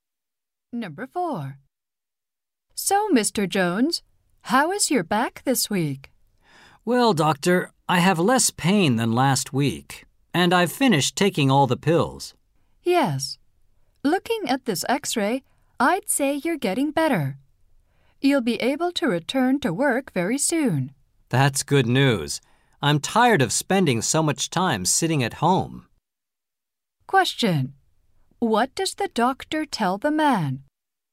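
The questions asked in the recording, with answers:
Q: What does the doctor tell the man?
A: He is getting better and can return to work soon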